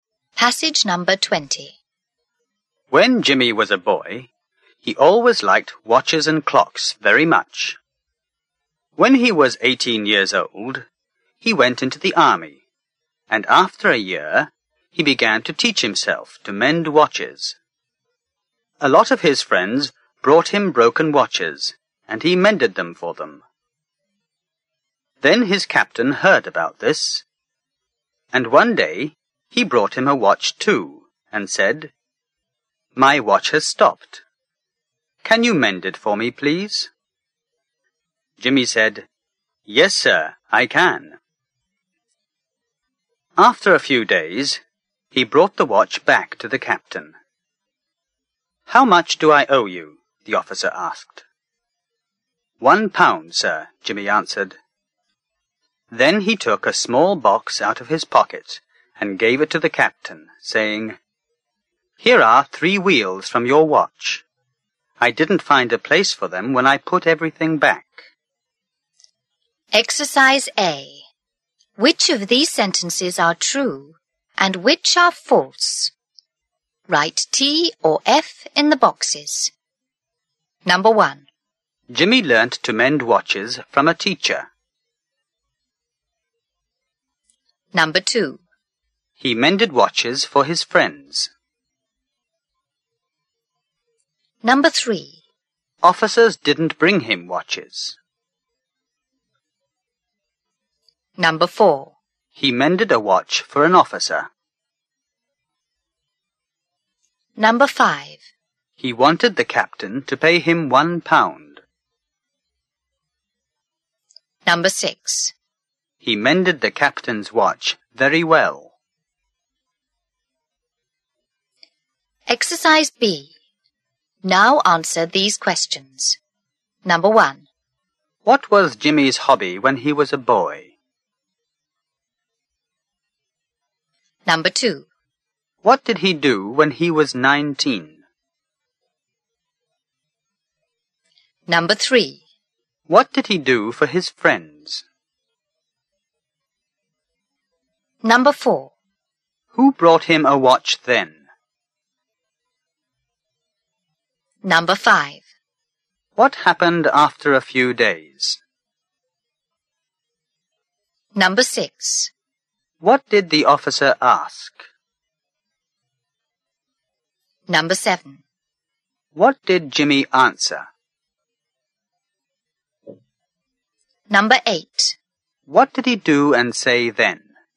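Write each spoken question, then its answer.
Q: Jimmy learnt to mend watches from a teacher.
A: False

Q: He mended watches for his friends.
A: True

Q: Officers didn't bring him watches.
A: False

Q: He mended a watch for an officer.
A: True

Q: He wanted the captain to pay him £1.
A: True

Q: He mended the captain's watch very well.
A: False

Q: What was Jimmy's hobby when he was a boy?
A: He liked watches and clocks

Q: What did he do when he was 19?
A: He began to teach himself to mend watches

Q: What did he do for his friends?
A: He mended their broken watches

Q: Who brought him a watch then?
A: His captain

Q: What happened after a few days?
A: He brought the watch back to the captain

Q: What did the officer ask?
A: How much do I owe you?

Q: What did Jimmy answer?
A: £1, sir

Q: What did he do and say then?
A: He gave the captain a small box with 3 wheels from the watch, saying he didn't find a place for them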